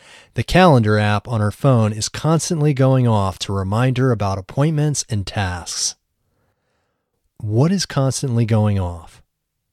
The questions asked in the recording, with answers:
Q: What is constantly going off?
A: Her calendar app on her phone is constantly going off.